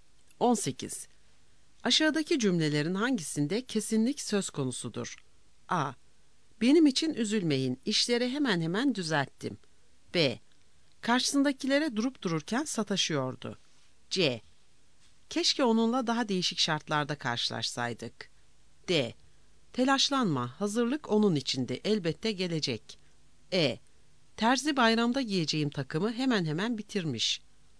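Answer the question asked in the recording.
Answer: D: Telaşlanma, hazırlık onun içindi, elbette gelecek.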